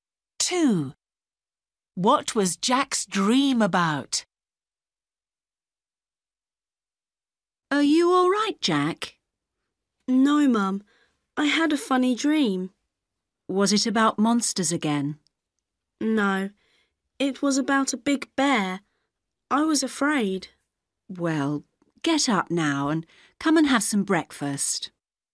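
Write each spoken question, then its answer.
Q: What was Jack's dream about?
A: a big bear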